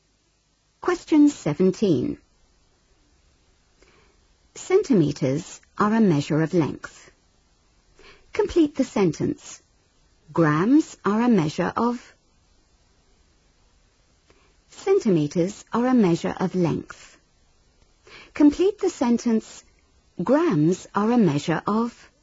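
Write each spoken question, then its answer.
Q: Complete the sentence. Grams are a measure of...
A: mass (weight)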